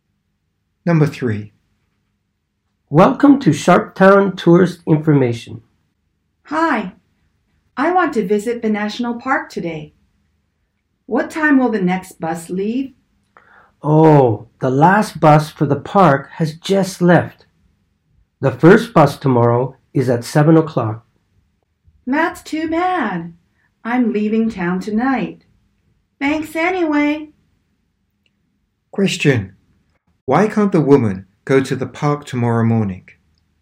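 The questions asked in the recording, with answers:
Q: Question. Why can't the woman go to the park tomorrow morning?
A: Because she is leaving town tonight.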